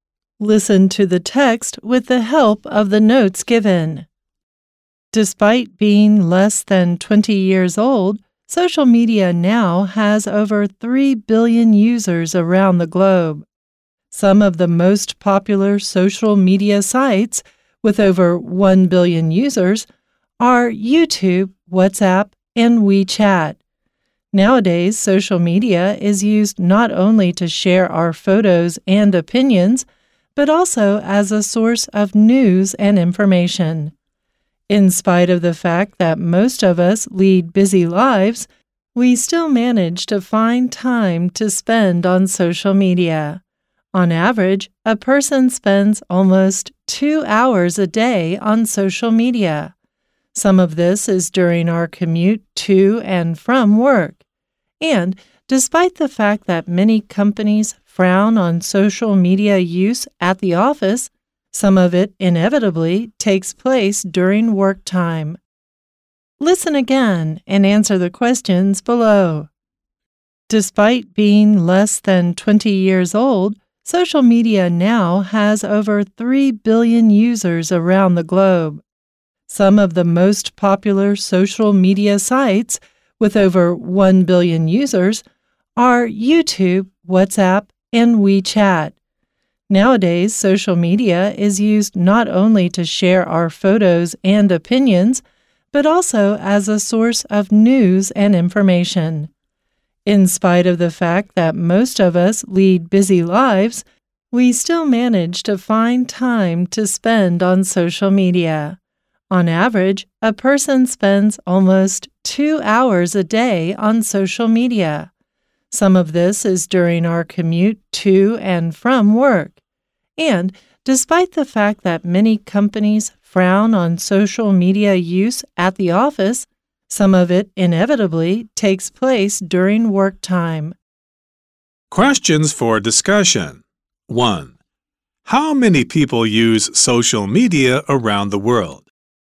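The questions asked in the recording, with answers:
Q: How many people use social media around the world?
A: Over 3 billion users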